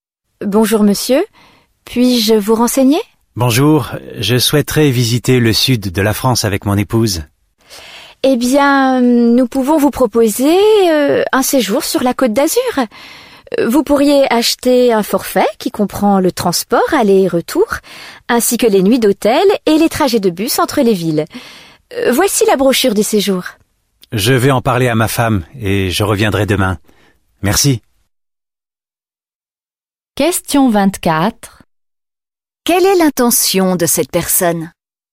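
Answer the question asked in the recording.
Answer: Visiter le sud de la France avec son épouse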